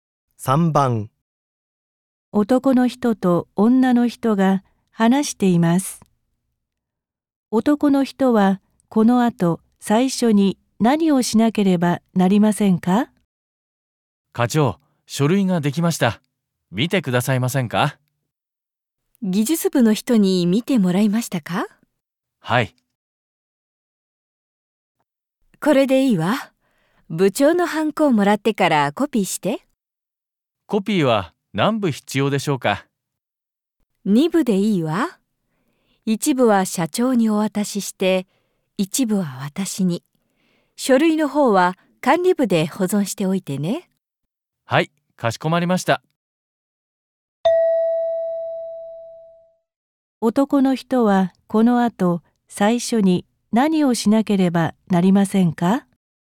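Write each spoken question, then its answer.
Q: 男の人はこの後最初に何をしなければなりませんか?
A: 部長のハンコをもらう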